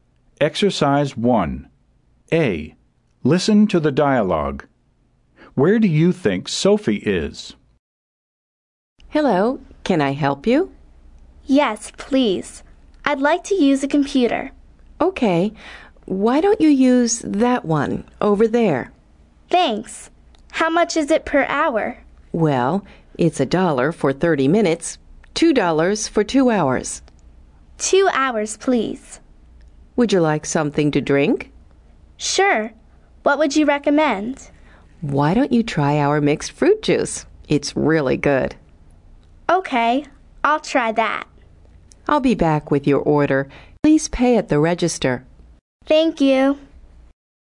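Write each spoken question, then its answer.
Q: Where do you think Sophie is?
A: At an internet café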